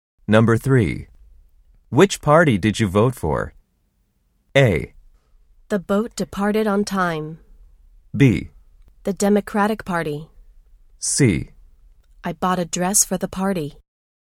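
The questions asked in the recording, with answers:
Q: Which party did you vote for?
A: B: The Democratic Party.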